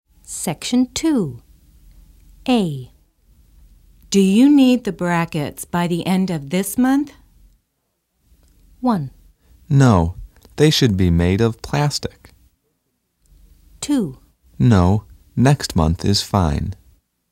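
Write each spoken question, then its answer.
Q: Do you need the brackets by the end of this month?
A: 2: No, next month is fine.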